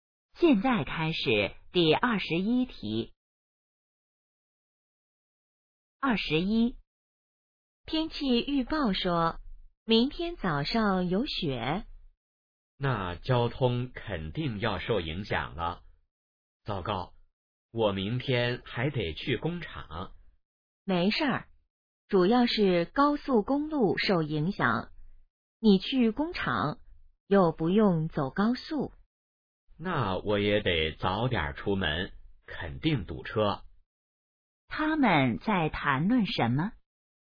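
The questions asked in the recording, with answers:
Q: 他们在谈论什么?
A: 下雪对交通的影响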